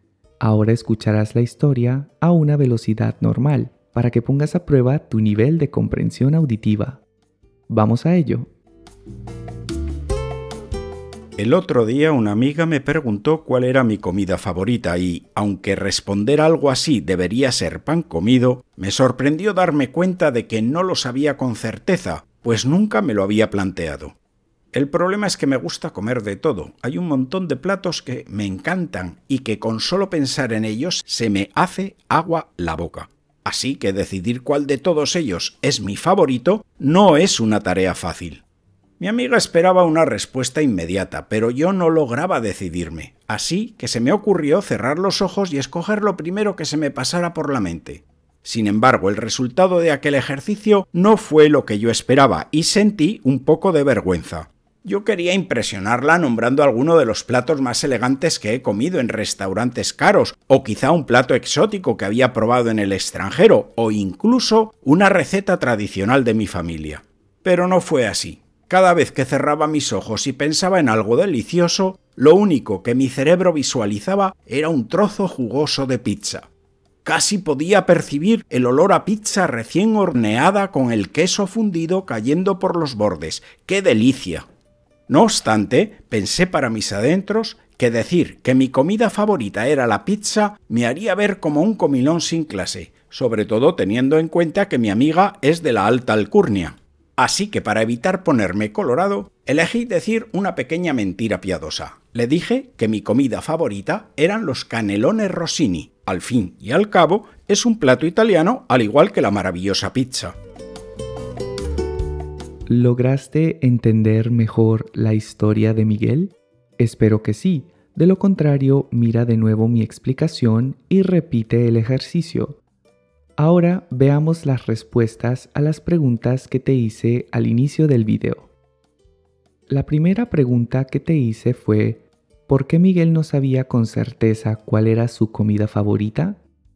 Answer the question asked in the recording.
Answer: porque nunca se lo había planteado y porque hay muchos platos que le gustan.